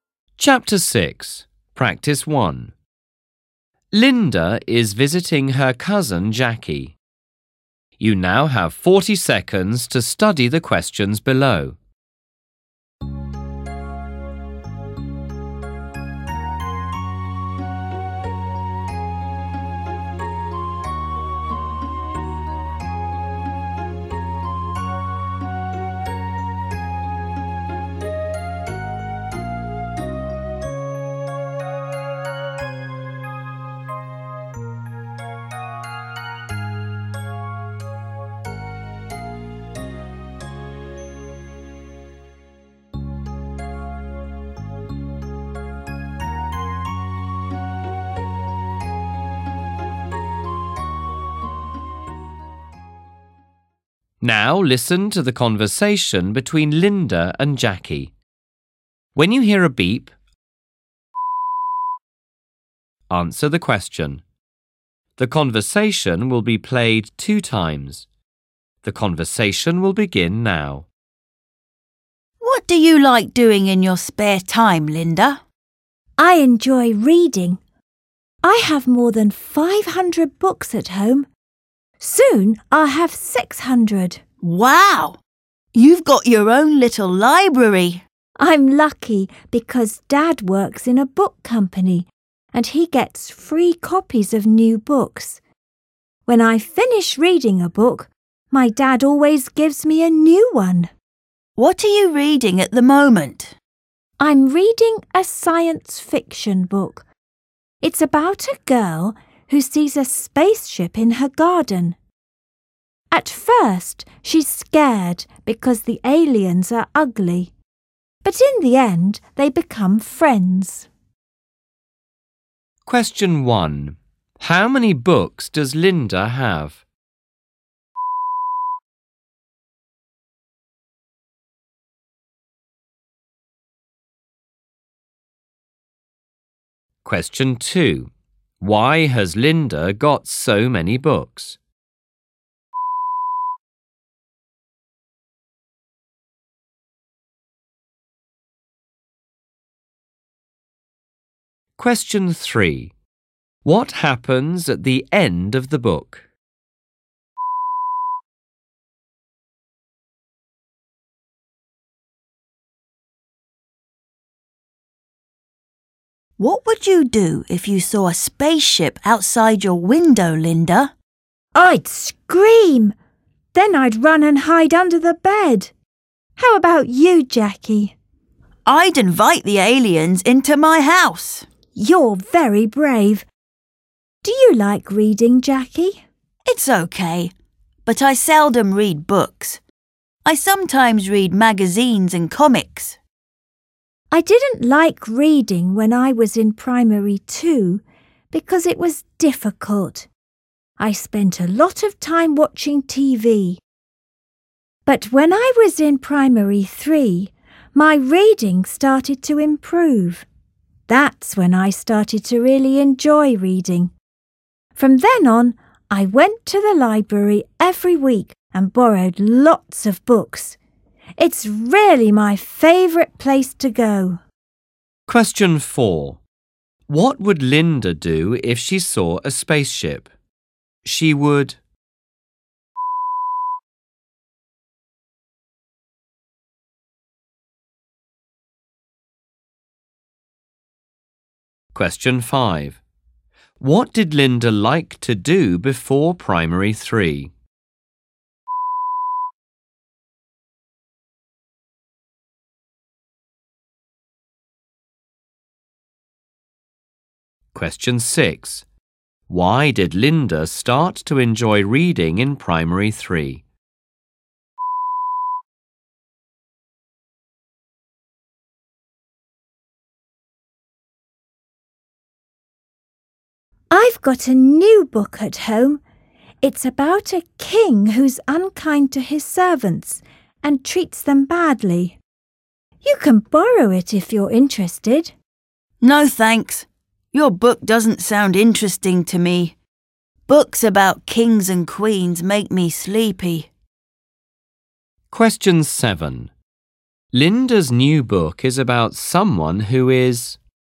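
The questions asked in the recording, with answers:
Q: How many books does Linda have?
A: More than 500

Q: Why has Linda got so many books?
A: Her dad works in a book company and gets free copies of new books

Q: What happens at the end of the book?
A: The girl and the aliens become friends

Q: What would Linda do if she saw a spaceship?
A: She would scream, then run and hide under the bed

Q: Linda's new book is about someone who is...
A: unkind to his servants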